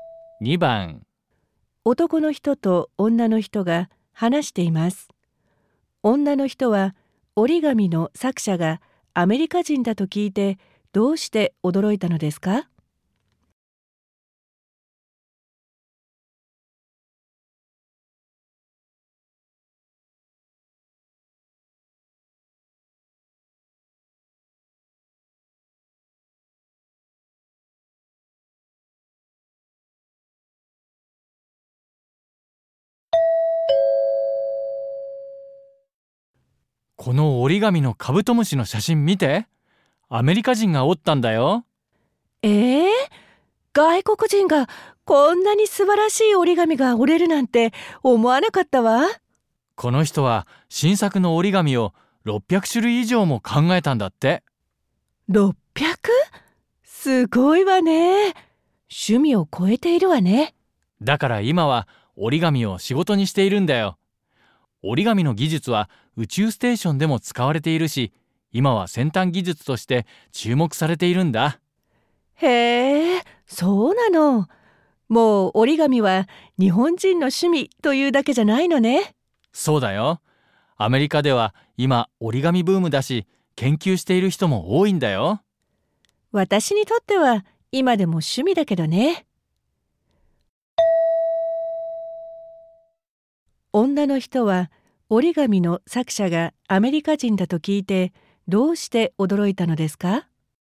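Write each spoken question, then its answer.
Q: 女の人は折り紙の作者がアメリカ人だと聞いてどうして驚いたのですか?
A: 外国人がこんなに素晴らしい折り紙を折れるとは思わなかったから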